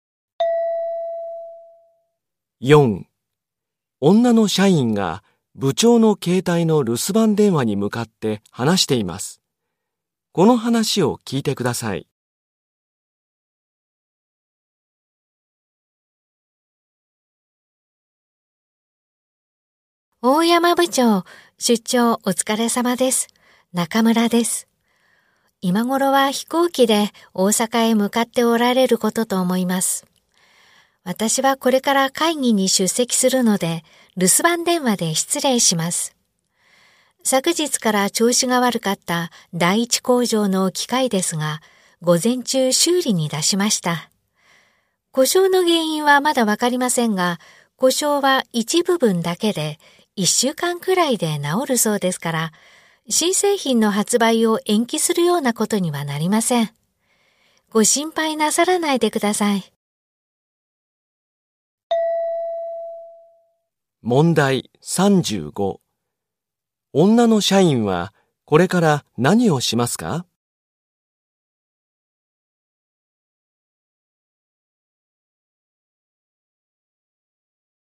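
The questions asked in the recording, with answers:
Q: 女の社員はこれから何をしますか?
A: 会議に出席する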